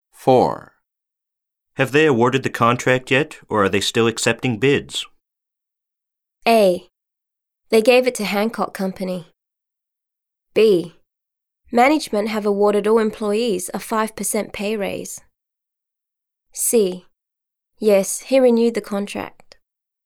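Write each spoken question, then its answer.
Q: Have they awarded the contract yet, or are they still accepting bids?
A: A: They gave it to Hancock Company.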